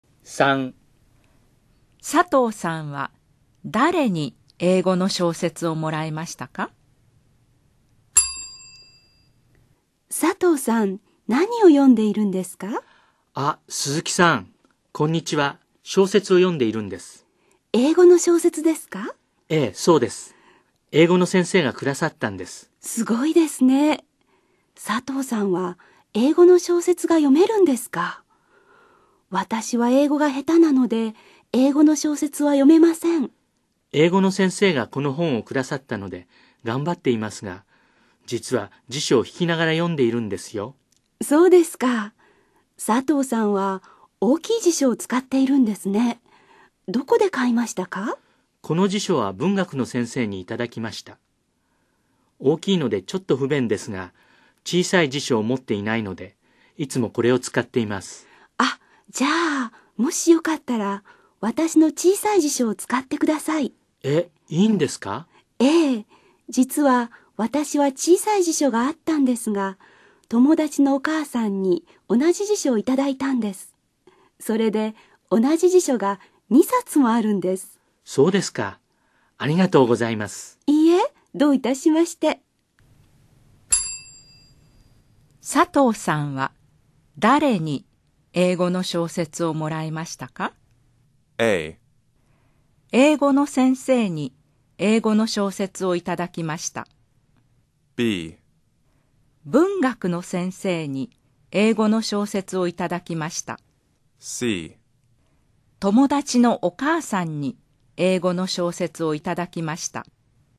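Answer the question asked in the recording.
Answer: A: 英語の先生に英語の小説をいただきました。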